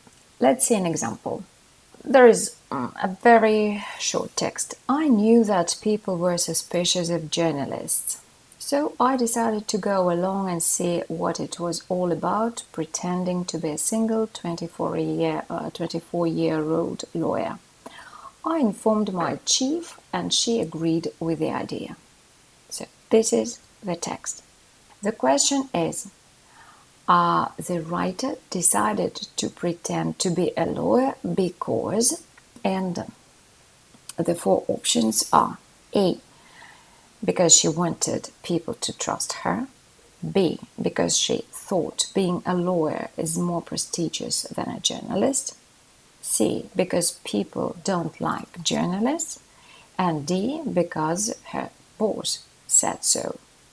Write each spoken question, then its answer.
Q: The question is Are the writer decided to pretend to be a lawyer because?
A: Well, the right option is A.